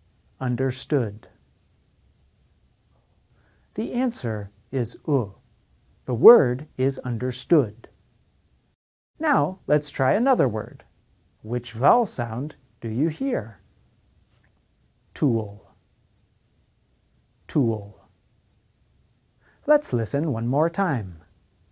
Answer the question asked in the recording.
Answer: The answer is oo.